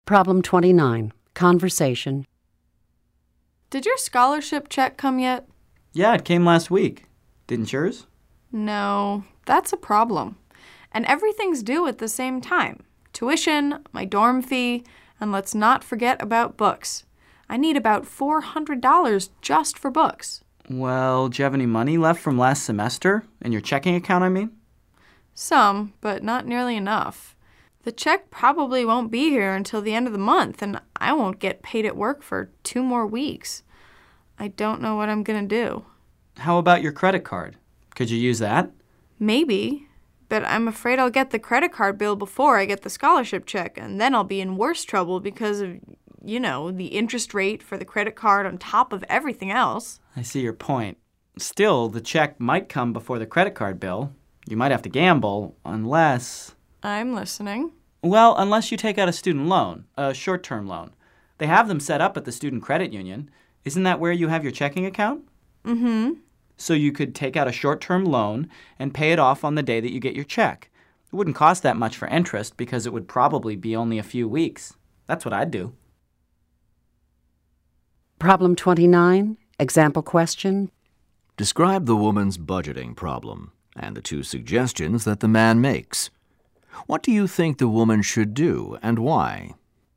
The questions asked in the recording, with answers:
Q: Describe the woman's budgeting problem and the two suggestions that the man makes.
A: The woman doesn't have enough money for her expenses.